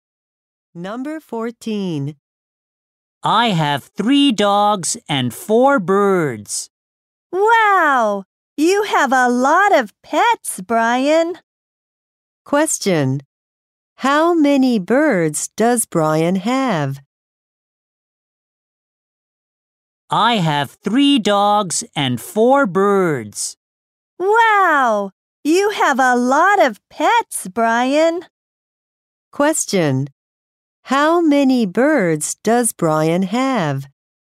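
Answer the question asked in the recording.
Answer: Four.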